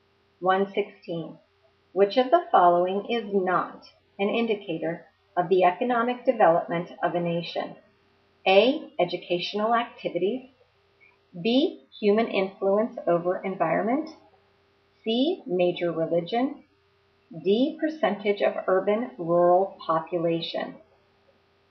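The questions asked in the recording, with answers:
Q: Which of the following is not an indicator of the economic development of a nation?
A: C: Major religion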